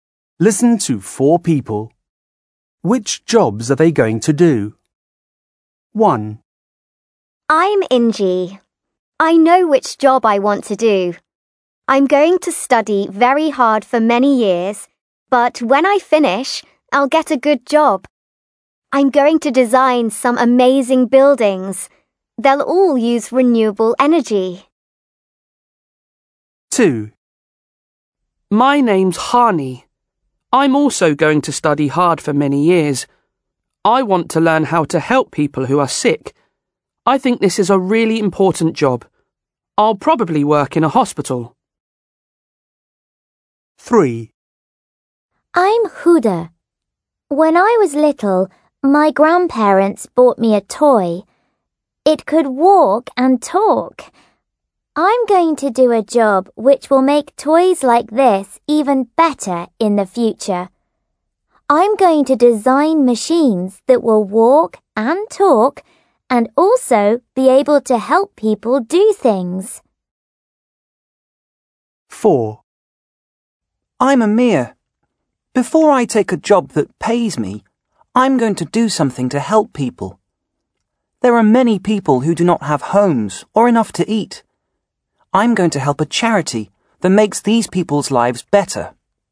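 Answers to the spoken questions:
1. An architect, designing buildings
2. A doctor, working in a hospital
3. A robot designer or engineer
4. A charity volunteer, helping people without homes or food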